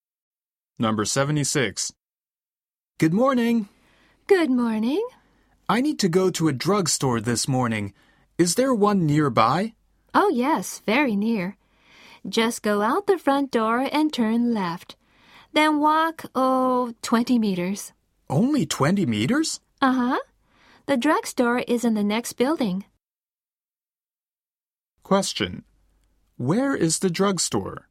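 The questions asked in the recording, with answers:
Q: Where is the drugstore?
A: In the next building, 20 meters to the left of the front door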